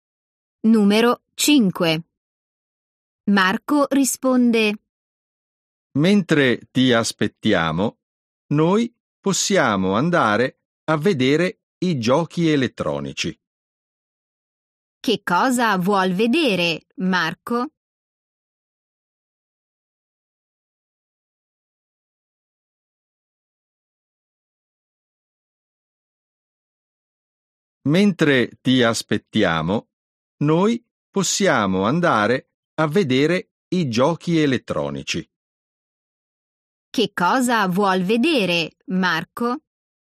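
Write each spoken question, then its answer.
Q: Che cosa vuol vedere, Marco?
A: i giochi elettronici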